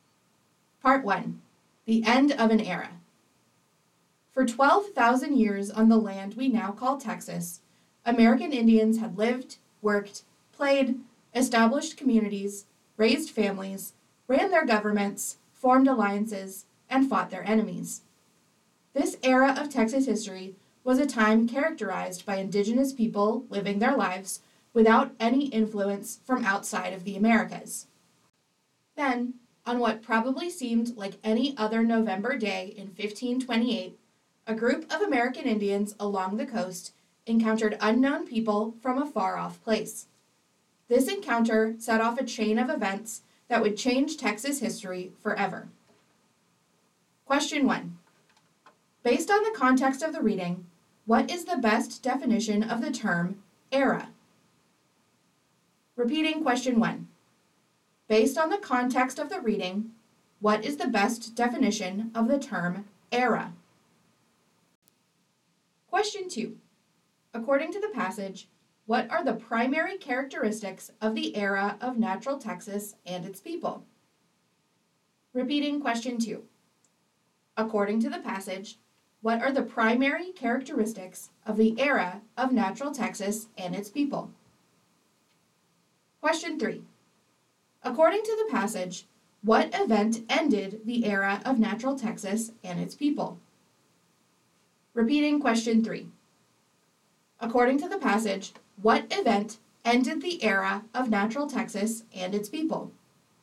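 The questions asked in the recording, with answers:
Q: Based on the context of the reading, what is the best definition of the term era?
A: A period of time in history marked by particular characteristics

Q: According to the passage, what are the primary characteristics of the era of Natural Texas and its people?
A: American Indians living their lives without any influence from outside the Americas

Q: According to the passage, what event ended the era of Natural Texas and its people?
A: The 1528 encounter between coastal American Indians and unknown people from a far-off place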